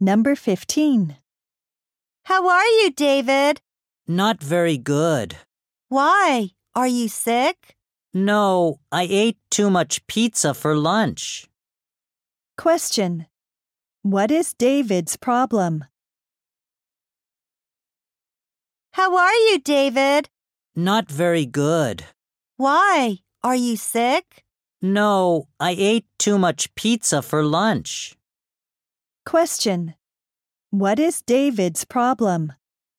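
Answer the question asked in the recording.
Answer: He ate too much pizza for lunch.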